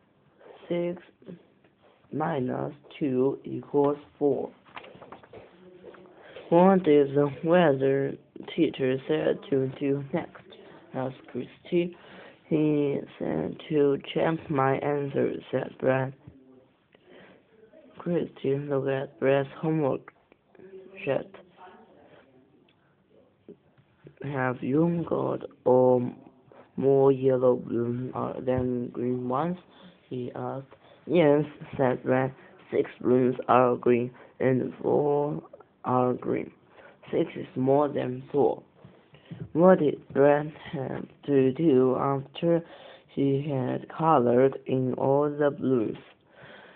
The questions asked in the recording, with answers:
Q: What did Brad have to do after he had colored in all the blooms?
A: Brad had to check to see if his answer was right.